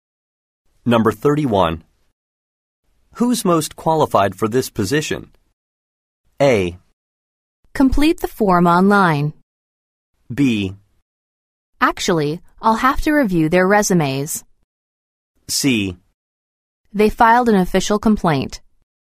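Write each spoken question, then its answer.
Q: Who's most qualified for this position?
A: B: Actually, I'll have to review their resumes.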